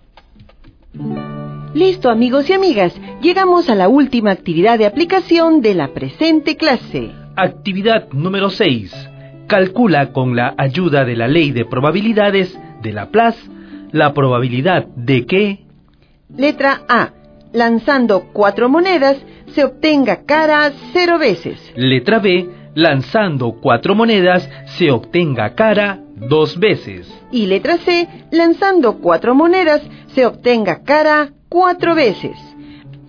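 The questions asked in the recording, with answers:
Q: Letra A. Lanzando 4 monedas, se obtenga cara 0 veces.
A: 1/16

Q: Letra B. Lanzando 4 monedas, se obtenga cara 2 veces.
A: 6/16 = 3/8

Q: Y letra C. Lanzando 4 monedas, se obtenga cara 4 veces.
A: 1/16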